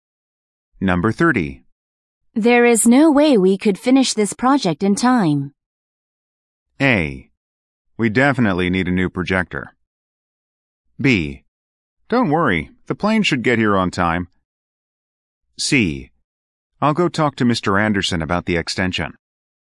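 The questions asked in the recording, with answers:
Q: There is no way we could finish this project in time.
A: C: I'll go talk to Mr. Anderson about the extension.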